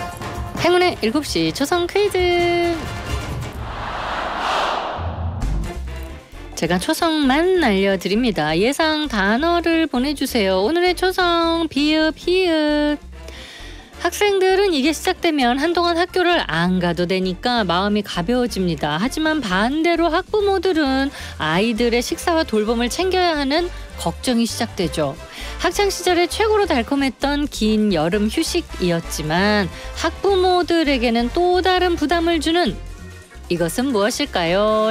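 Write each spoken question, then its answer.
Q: 학창시절에 최고로 달콤했던 긴 여름 휴식이었지만 학부모들에게는 또 다른 부담을 주는 이것은 무엇일까요?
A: 방학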